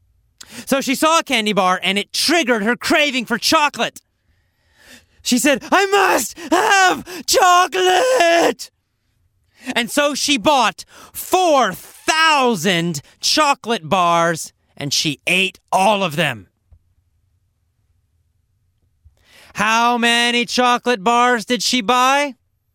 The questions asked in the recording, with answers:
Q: How many chocolate bars did she buy?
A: 4,000. She bought 4,000 chocolate bars.